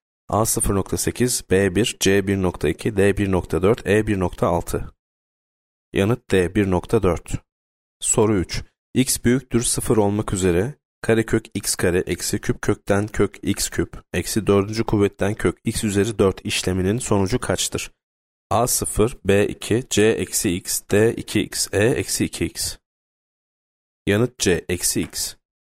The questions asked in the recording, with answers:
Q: kuvvetten kök x üzeri 4 işleminin sonucu kaçtır?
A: Yanıt C eksi x.